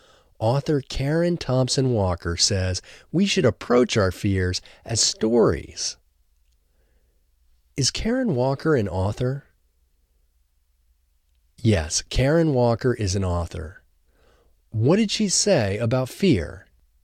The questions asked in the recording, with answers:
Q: What did she say about fear?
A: She says we should approach our fears as stories.